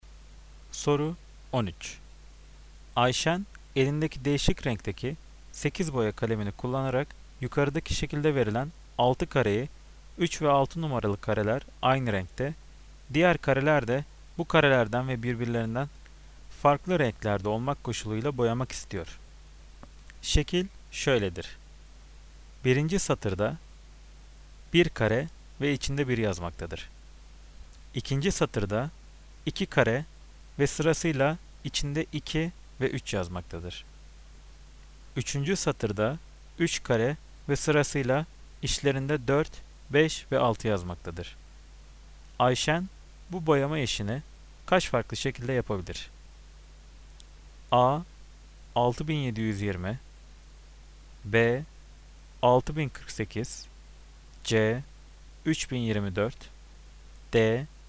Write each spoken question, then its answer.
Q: Ayşen bu boyama işini kaç farklı şekilde yapabilir?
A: Cevap A. 6720.